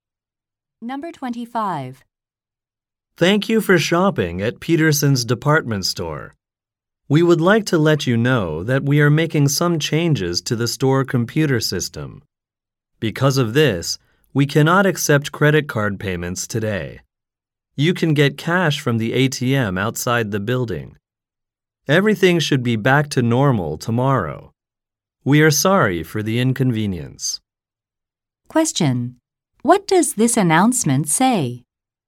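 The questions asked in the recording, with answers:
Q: What does this announcement say?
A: Credit cards cannot be used today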